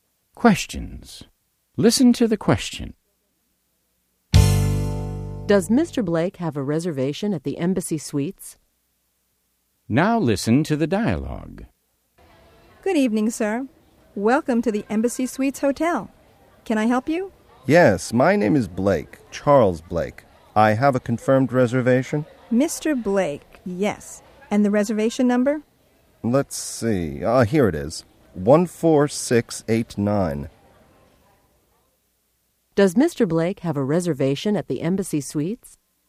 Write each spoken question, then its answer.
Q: Does Mr. Blake have a reservation at the Embassy Suites?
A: Yes, he has a confirmed reservation.